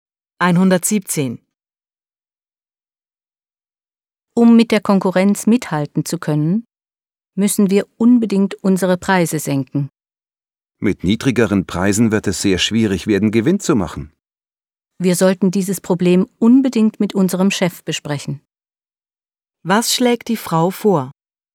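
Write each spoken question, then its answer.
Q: Was schlägt die Frau vor?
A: Das Problem mit dem Chef zu besprechen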